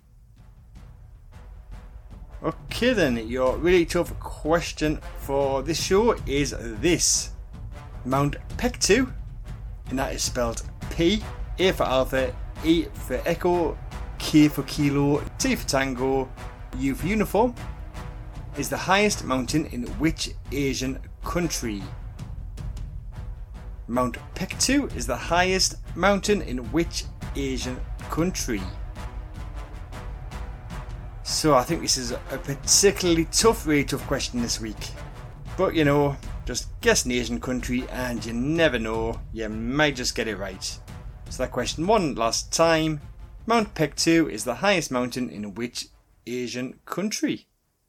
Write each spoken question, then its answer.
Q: Mount Pektu is the highest mountain in which Asian country?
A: the correct answer is North Korea.